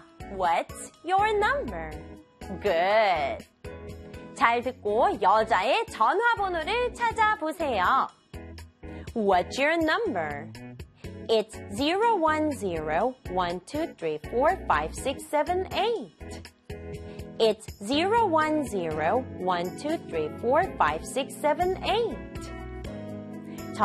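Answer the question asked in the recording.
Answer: 010-1234-5678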